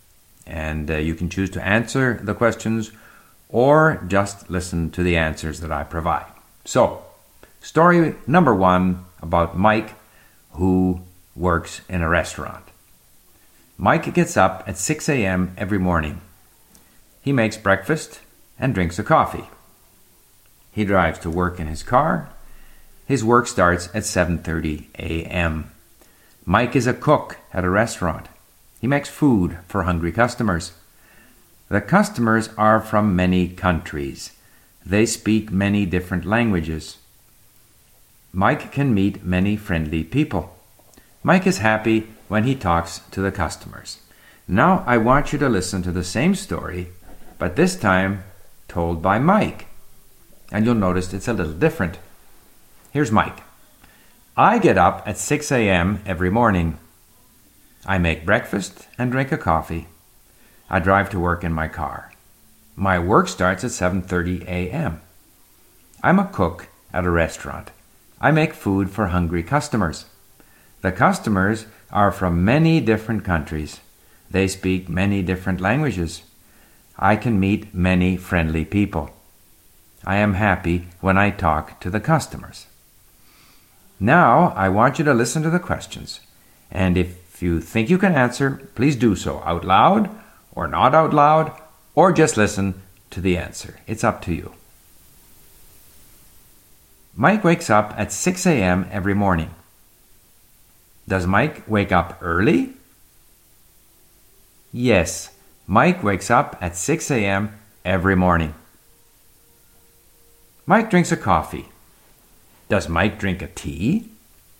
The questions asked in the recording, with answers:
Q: Does Mike drink a tea?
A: No, Mike does not drink a tea.